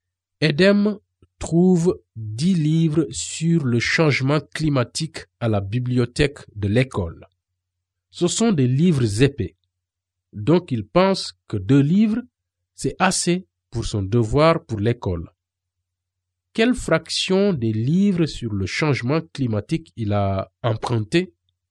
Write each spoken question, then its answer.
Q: Quelle fraction des livres sur le changement climatique il a emprunté?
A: Je pense que c'est 2/10.